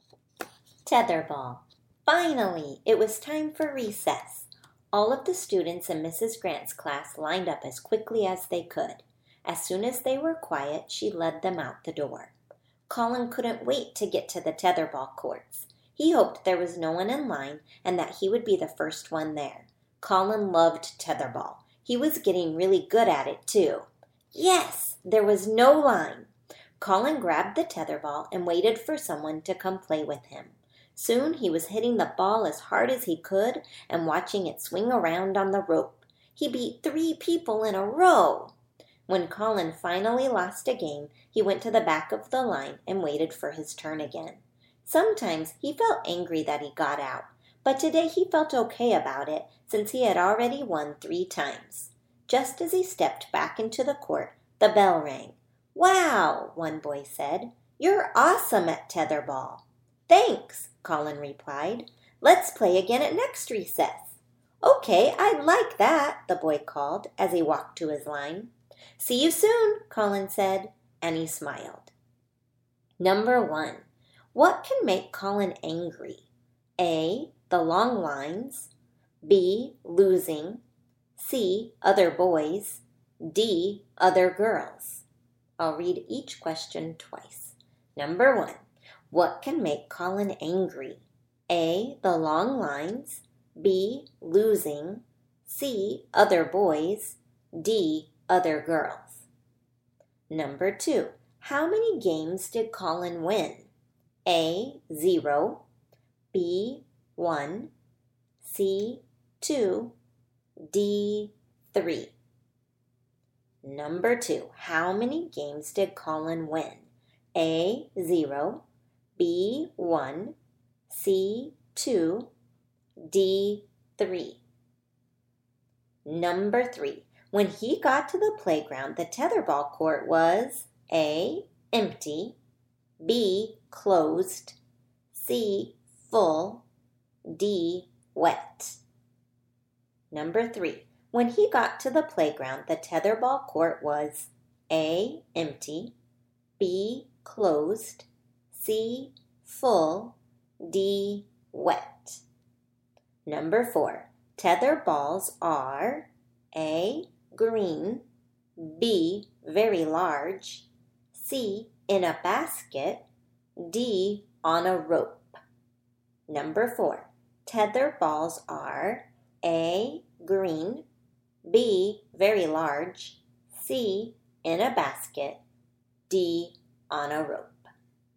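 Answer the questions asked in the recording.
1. B: Losing.
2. D: 3.
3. A: empty.
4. D: on a rope.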